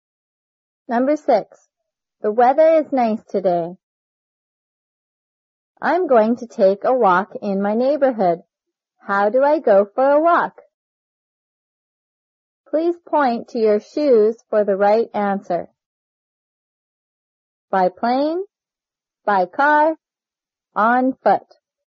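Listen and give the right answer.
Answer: on foot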